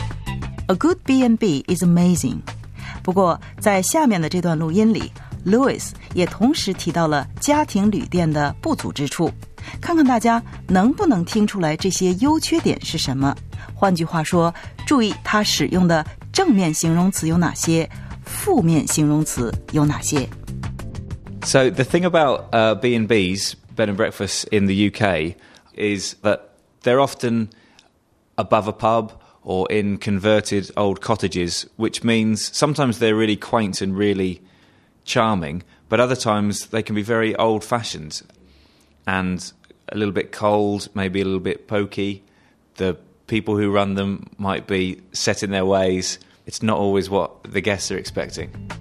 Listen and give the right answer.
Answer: 这些旅店可能非常的 quaint, 古雅的 and charming, 迷人的。